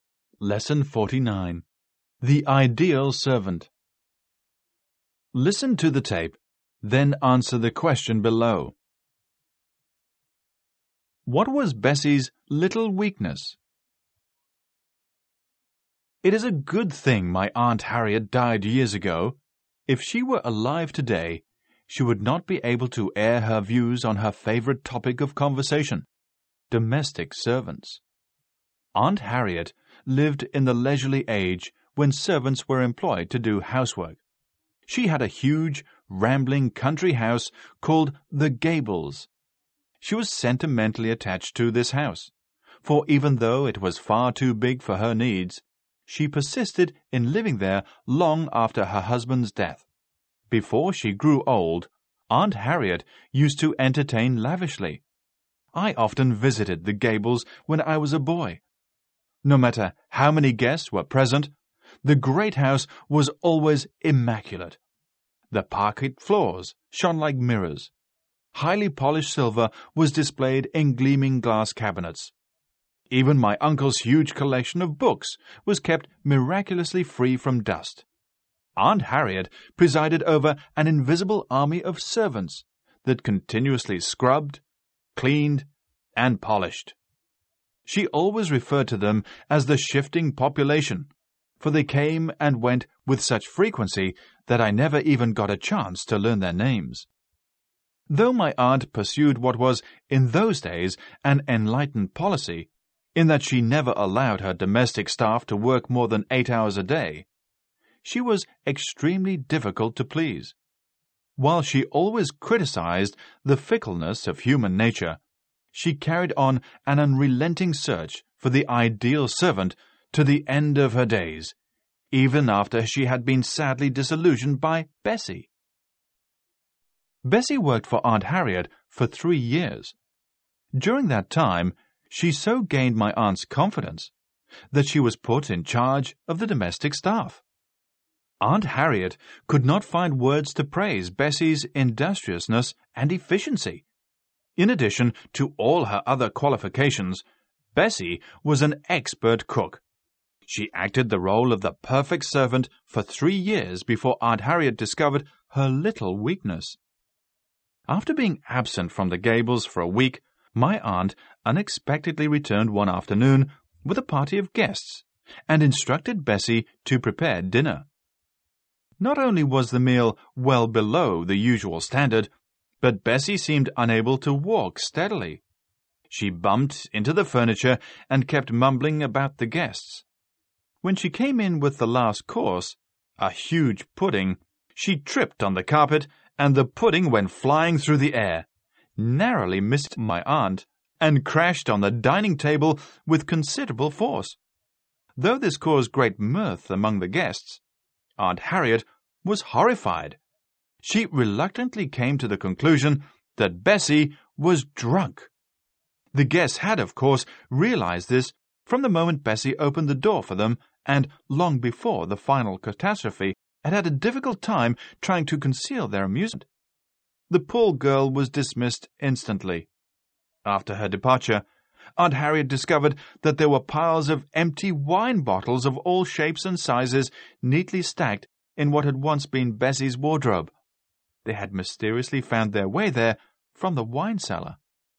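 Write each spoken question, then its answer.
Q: What was Bessie's little weakness?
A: She drank too much (she secretly drank wine from the cellar).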